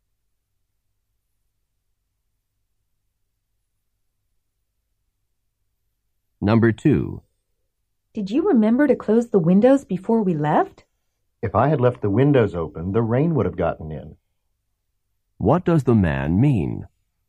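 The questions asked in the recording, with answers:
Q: What does the man mean?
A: He closed the windows.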